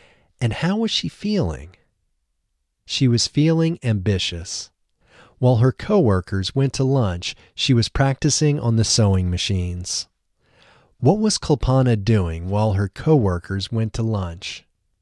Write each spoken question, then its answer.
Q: What was Kulpana doing while her coworkers went to lunch?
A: She was practicing on the sewing machines while her coworkers went to lunch.